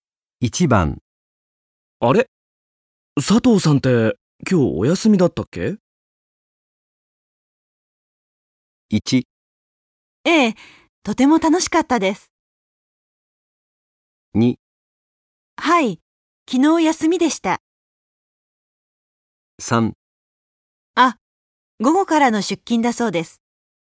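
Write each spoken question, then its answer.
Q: あれ?佐藤さんって今日お休みだったっけ?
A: 3: あ、午後からの出勤だそうです。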